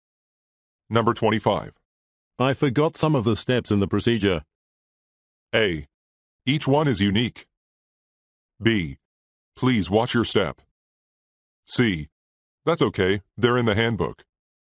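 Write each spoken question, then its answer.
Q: I forgot some of the steps in the procedure.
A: C: That's okay, they're in the handbook.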